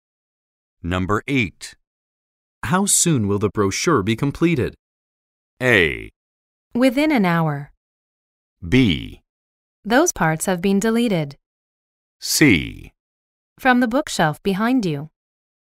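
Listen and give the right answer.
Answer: A: Within an hour.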